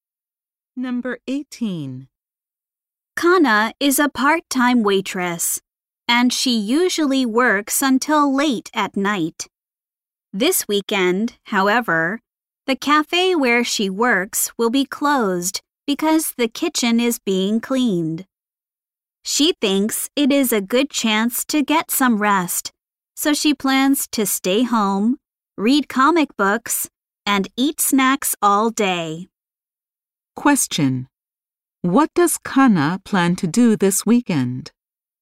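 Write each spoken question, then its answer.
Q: What does Kana plan to do this weekend?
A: Stay home, read comic books and eat snacks.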